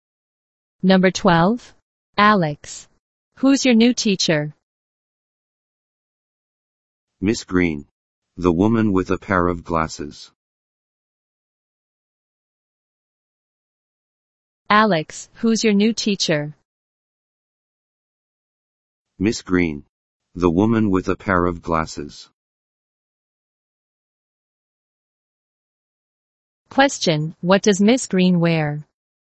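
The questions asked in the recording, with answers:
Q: Question, what does Miss Green wear?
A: A pair of glasses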